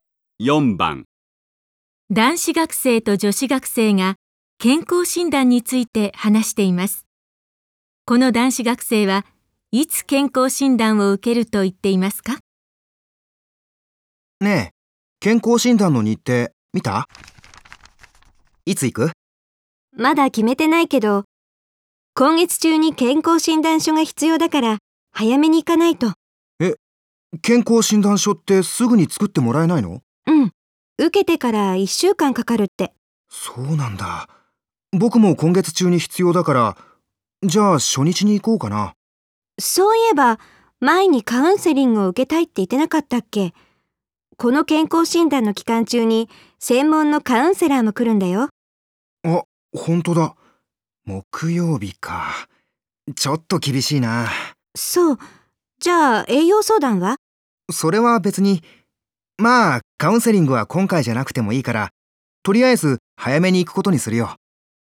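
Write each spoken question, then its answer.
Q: この男子学生はいつ健康診断を受けると言っていますか?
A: 健康診断の初日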